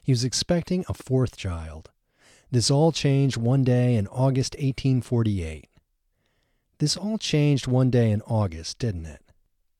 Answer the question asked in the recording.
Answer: Yes, this all changed one day in August.